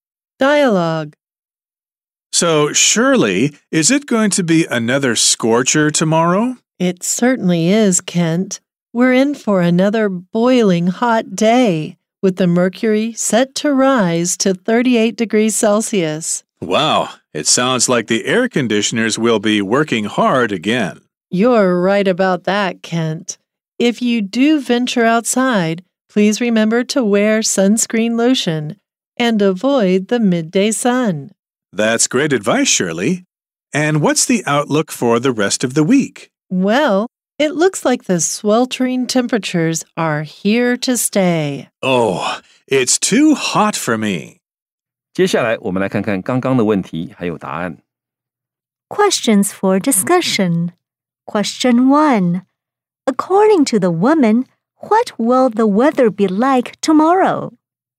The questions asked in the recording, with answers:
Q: According to the woman, what will the weather be like tomorrow?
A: It will be boiling hot tomorrow.